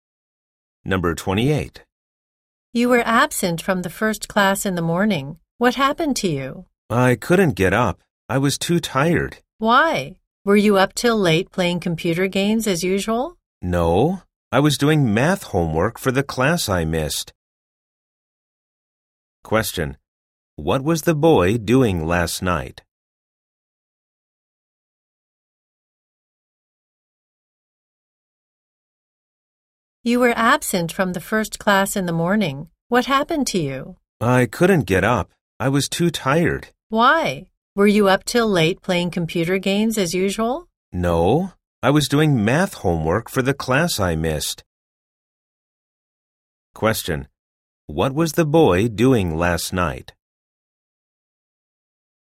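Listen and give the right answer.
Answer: Doing math homework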